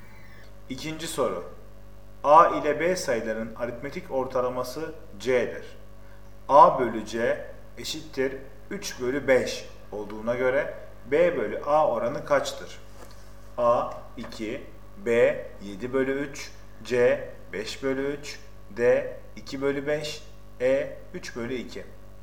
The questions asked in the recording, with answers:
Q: A bölü C eşittir 3 bölü 5 olduğuna göre B bölü A oranı kaçtır?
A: Doğru cevap B 7 bölü 3.